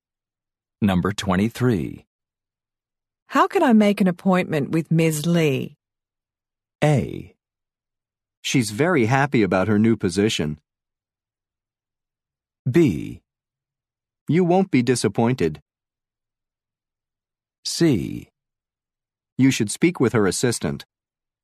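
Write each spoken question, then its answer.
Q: How can I make an appointment with Ms. Lee?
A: C: You should speak with her assistant.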